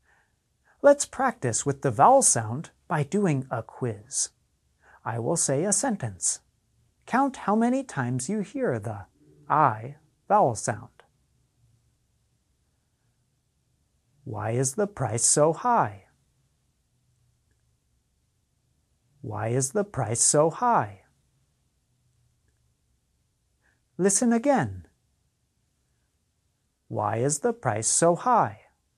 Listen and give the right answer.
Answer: The I vowel sound appeared 3 times in the sentence.